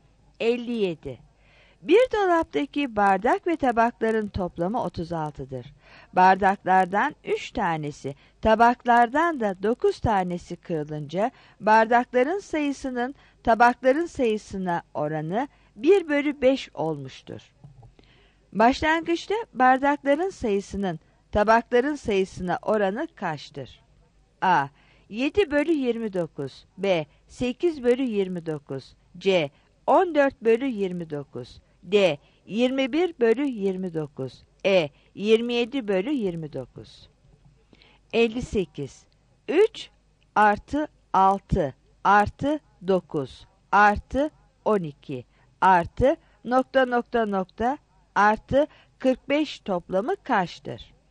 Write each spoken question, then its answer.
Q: Başlangıçta bardakların sayısının tabakların sayısına oranı kaçtır?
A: 57 A